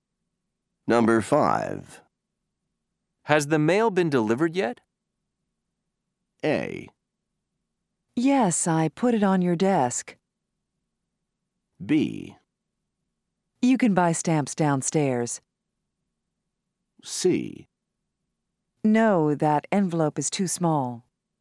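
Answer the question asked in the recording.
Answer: A: Yes, I put it on your desk.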